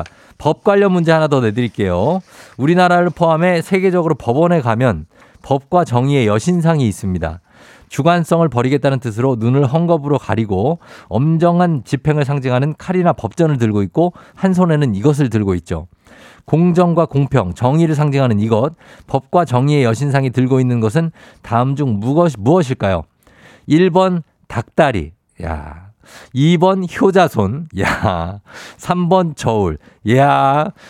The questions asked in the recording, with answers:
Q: 공정과 공평, 정의를 상징하는 이것, 법과 정의의 여신상이 들고 있는 것은 다음 중 무엇, 무엇일까요?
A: 바로바로바로바로 바로 바로 바로 저울입니다.